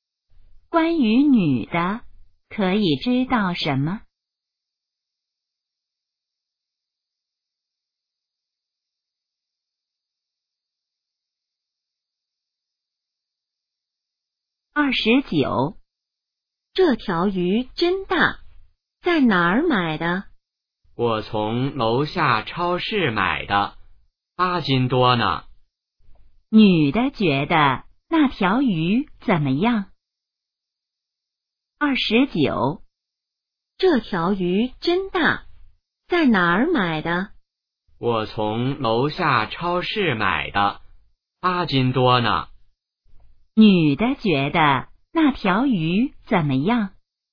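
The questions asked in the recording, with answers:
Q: 女的觉得那条鱼怎么样?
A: 很大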